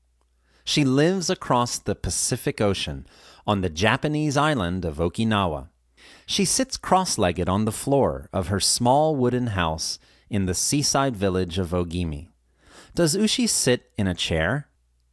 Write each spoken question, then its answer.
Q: Does Ushi sit in a chair?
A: No, she sits on the floor.